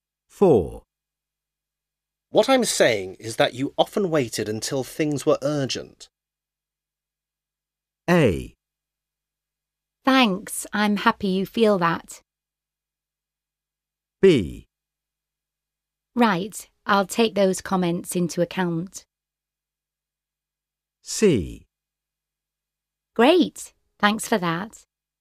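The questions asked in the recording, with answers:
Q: What I'm saying is that you often waited until things were urgent.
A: B: Right, I'll take those comments into account.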